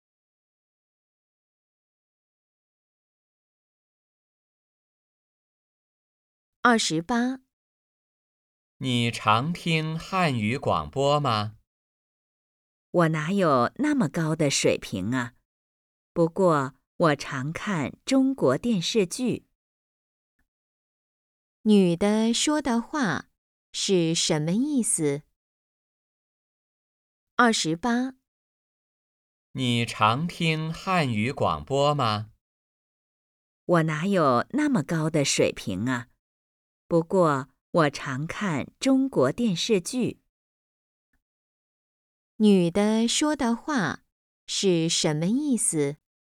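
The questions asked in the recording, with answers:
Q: 女的说的话是什么意思?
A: 她汉语水平不高,不常听汉语广播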